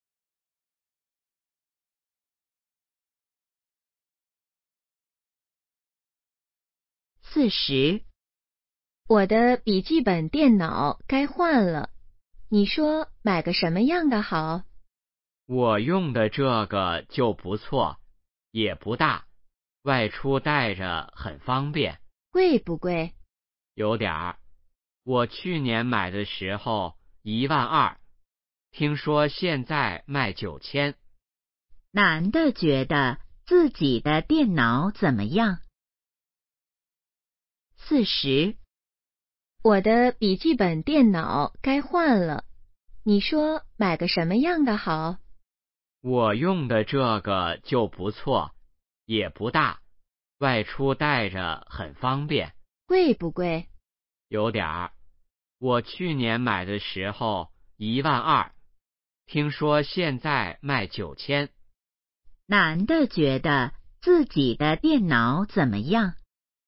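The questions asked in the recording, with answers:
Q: 男的觉得自己的电脑怎么样?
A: 不错,不大,带着方便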